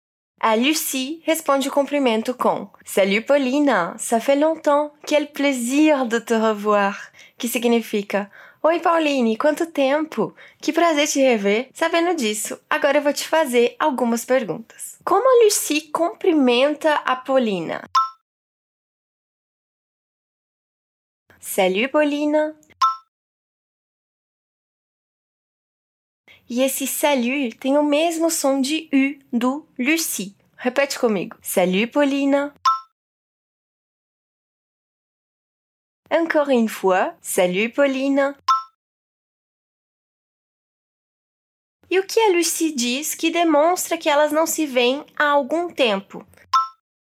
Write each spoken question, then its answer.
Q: E o que a Lucie diz que demonstra que elas não se veem há algum tempo?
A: Ça fait longtemps.